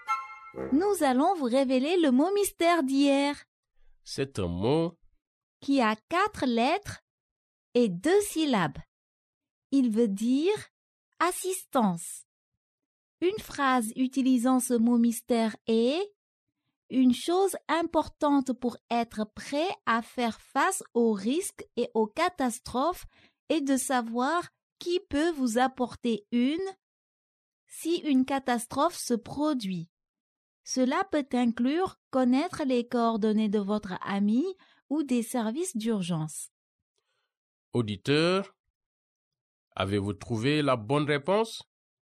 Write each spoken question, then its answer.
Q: Auditeur, avez-vous trouvé la bonne réponse?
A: Le mot mystère d'aujourd'hui est aide.